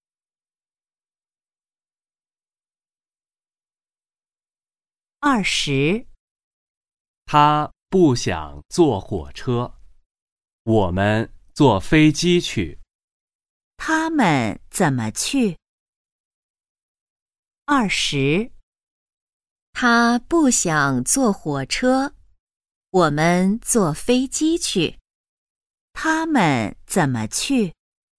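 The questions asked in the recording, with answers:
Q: 他们怎么去?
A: 坐飞机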